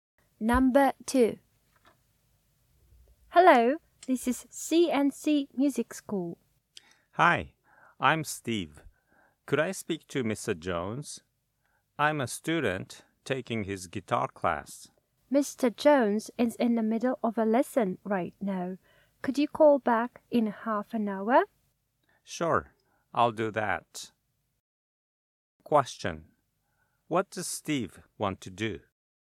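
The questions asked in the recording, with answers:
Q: What does Steve want to do?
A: Speak to Mr. Jones, his guitar teacher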